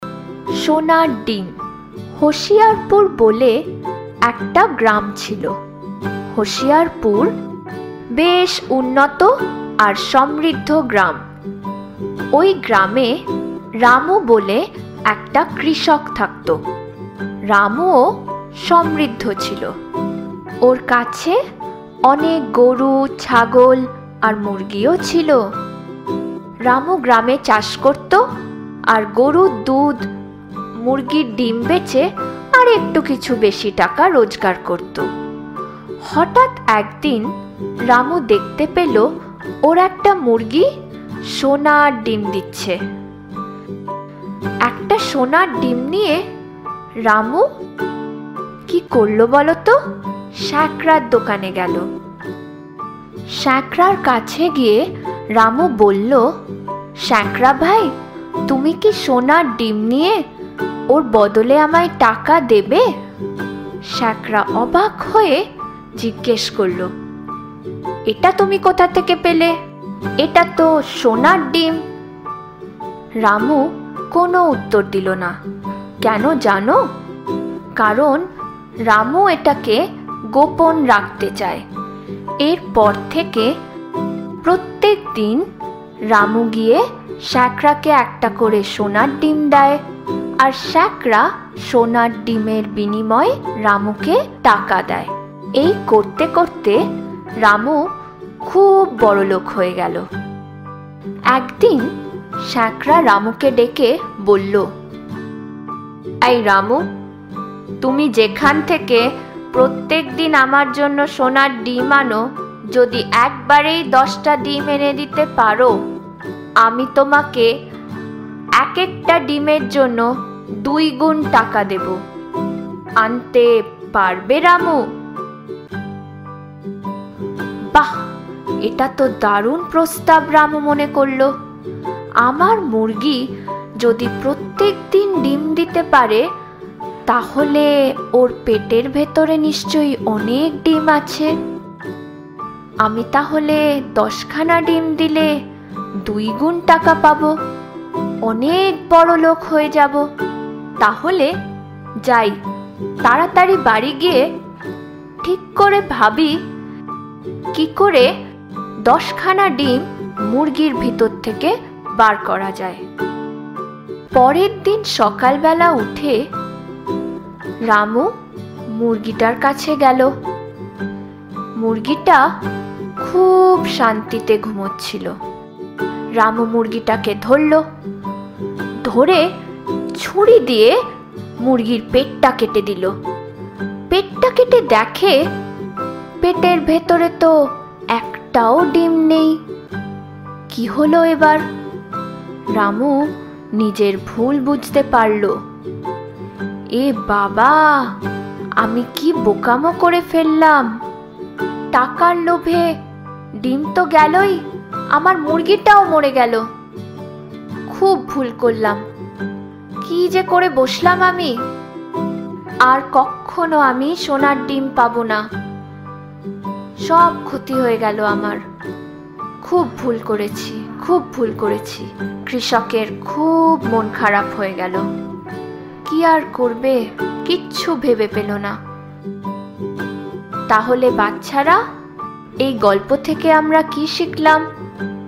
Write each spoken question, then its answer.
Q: তাহলে বাচ্চারা, এই গল্প থেকে আমরা কি শিখলাম?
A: কখনো লোভী হইও না। লোভে পাপ, পাপে মৃত্যু।